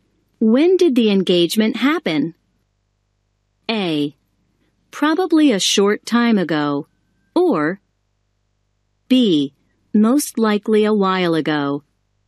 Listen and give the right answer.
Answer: If you said A, you are correct.